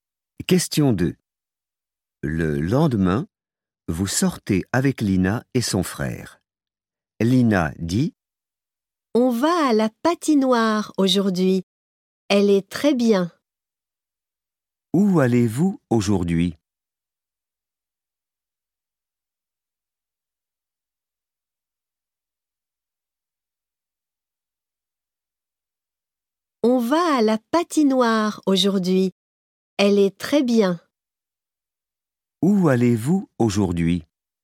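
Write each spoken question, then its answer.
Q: Où allez-vous aujourd'hui?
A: à la patinoire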